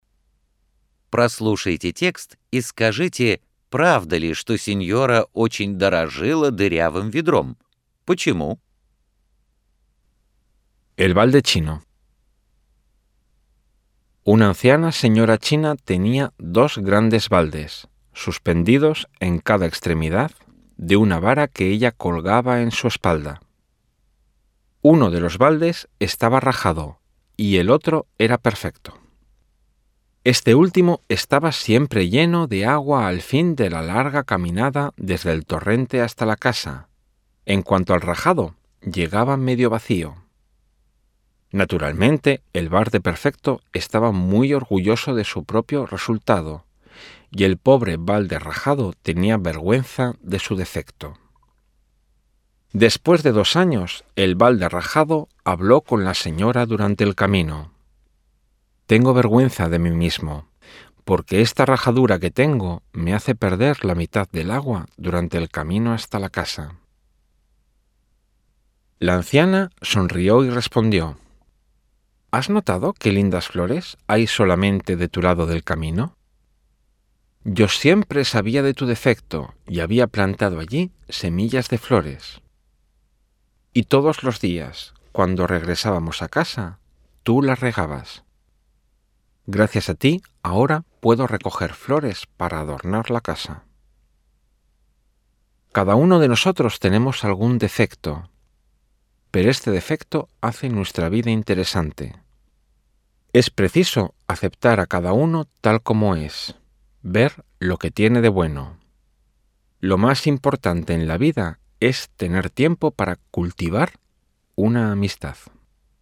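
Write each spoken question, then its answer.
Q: Прослушайте текст и скажите, правда ли, что синьора очень дорожила дырявым ведром?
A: Да, правда

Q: Почему?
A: Потому что благодаря ему поливались цветы, которые она посадила вдоль дороги, и она могла украшать ими дом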